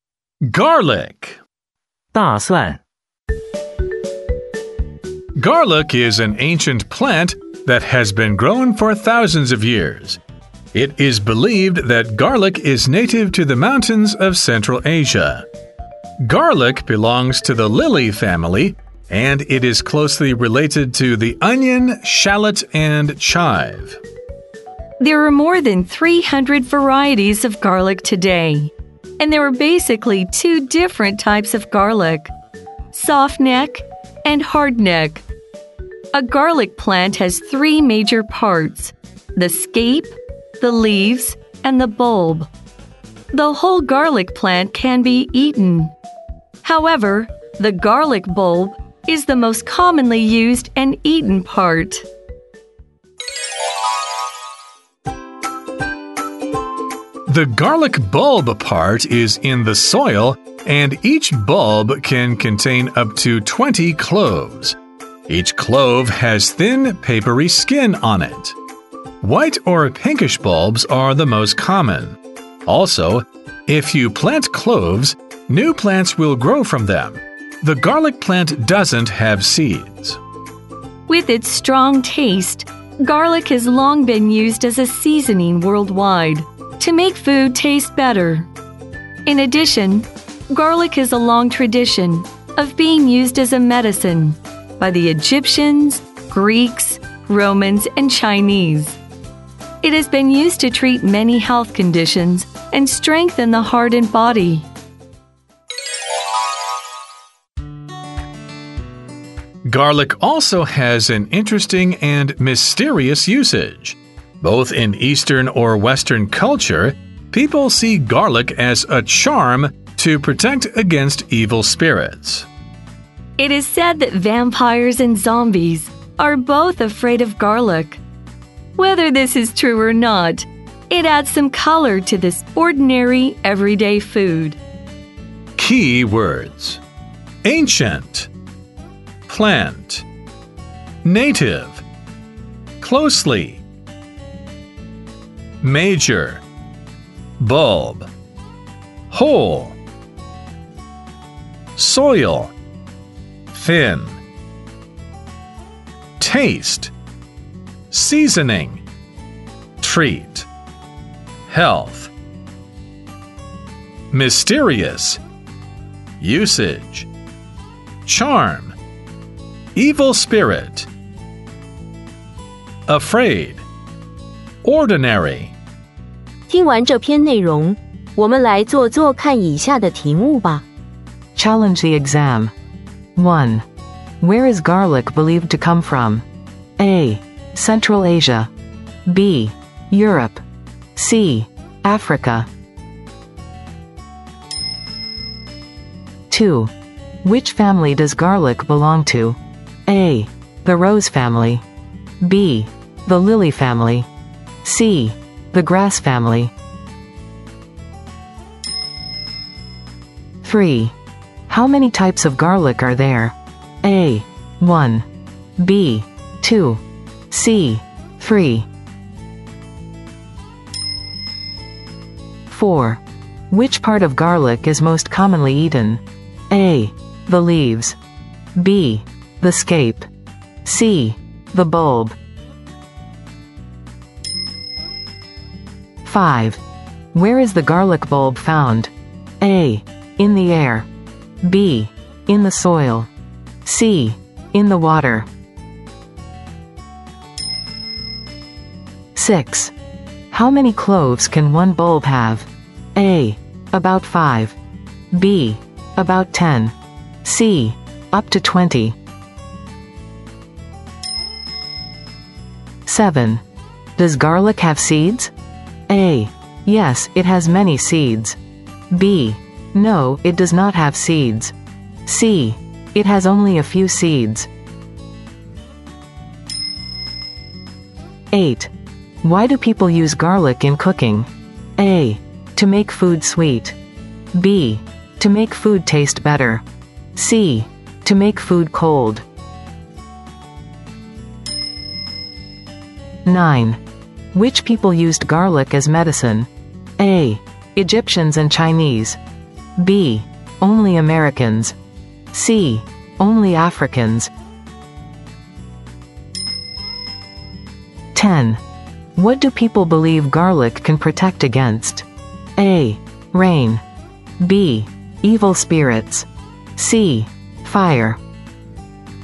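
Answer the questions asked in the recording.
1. A: Central Asia.
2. B: The lily family.
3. B: 2.
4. C: The bulb.
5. B: In the soil.
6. C: Up to 20.
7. B: No, it does not have seeds.
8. B: To make food taste better.
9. A: Egyptians and Chinese.
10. B: Evil spirits.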